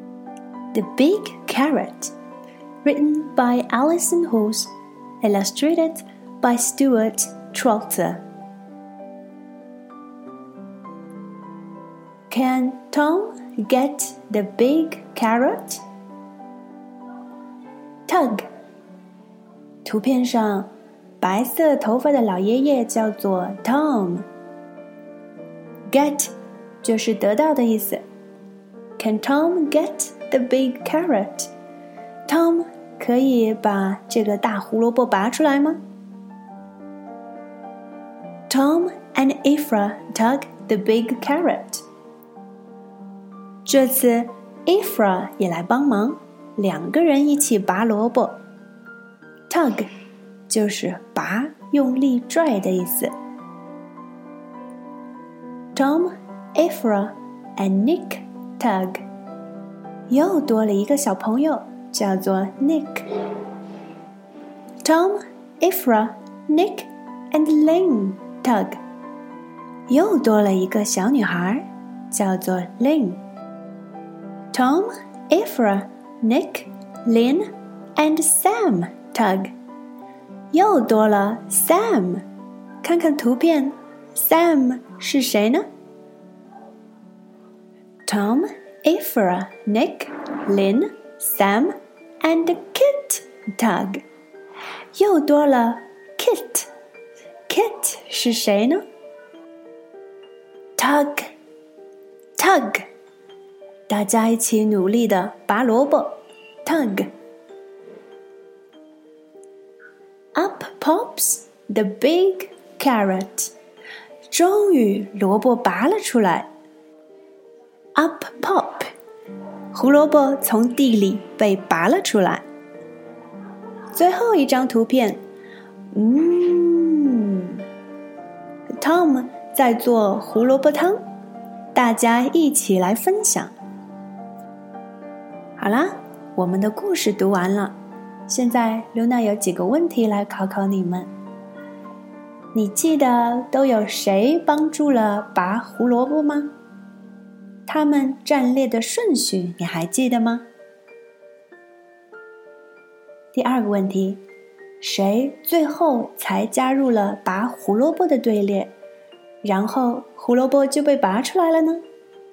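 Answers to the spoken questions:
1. Tom、Ifra、Nick、Lynn、Sam、Kit
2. Kit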